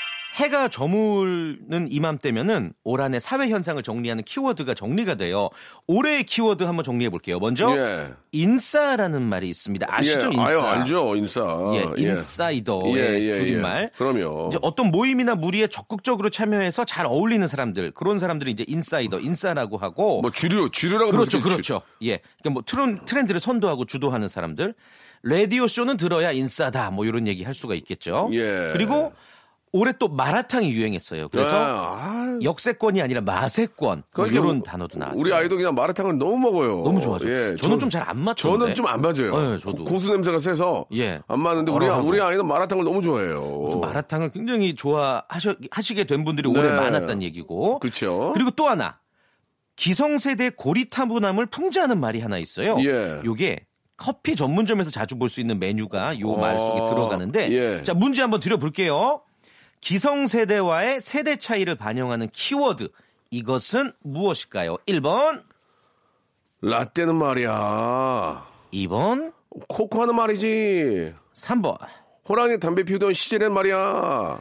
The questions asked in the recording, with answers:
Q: 기성세대와의 세대 차이를 반영하는 키워드 이것은 무엇일까요?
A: 예, 1번. 라떼는 말이야.